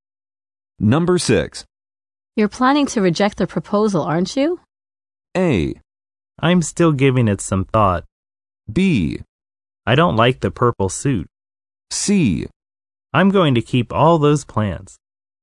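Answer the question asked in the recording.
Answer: A: I'm still giving it some thought.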